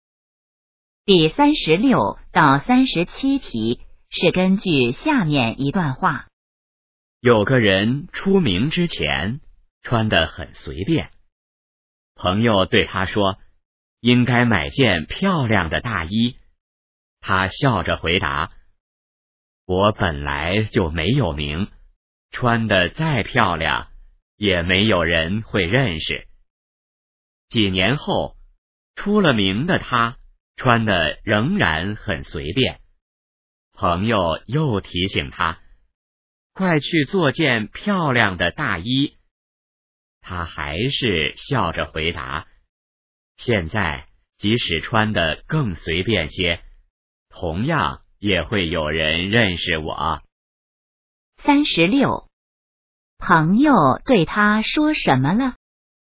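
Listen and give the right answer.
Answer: 应该买件漂亮的大衣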